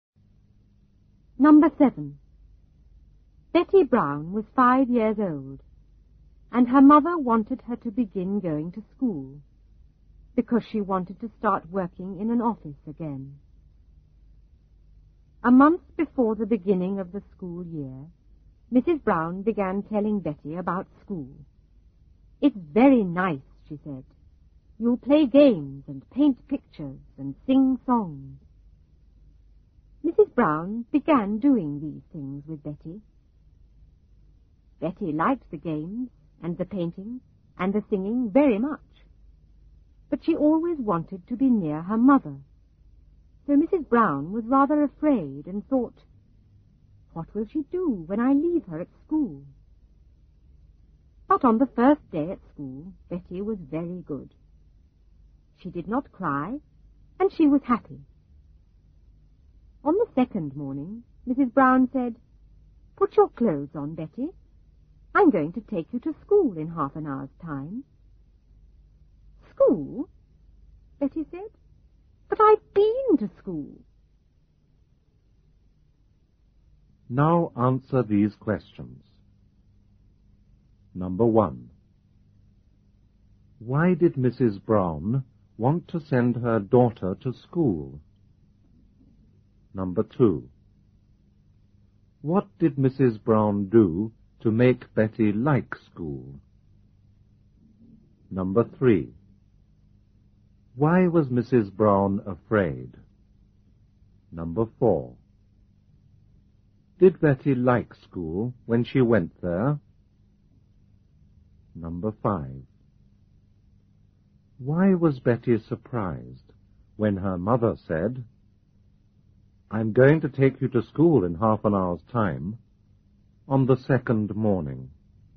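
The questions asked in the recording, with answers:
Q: Why did Mrs. Brown want to send her daughter to school?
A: Because she wanted to start working in an office again.

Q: What did Mrs. Brown do to make Betty like school?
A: She told Betty about school and played games, painted pictures and sang songs with her.

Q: Why was Mrs. Brown afraid?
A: Because Betty always wanted to be near her mother, so she worried what Betty would do when left at school.

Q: Did Betty like school when she went there?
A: Yes, she did not cry and was happy.

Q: Why was Betty surprised when her mother said, "I'm going to take you to school in half an hour's time," on the second morning?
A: Because she thought she had already been to school and didn't need to go again.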